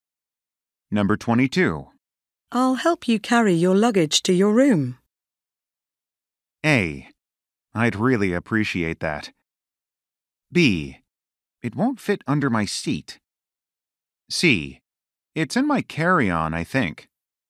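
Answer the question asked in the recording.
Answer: A: I'd really appreciate that.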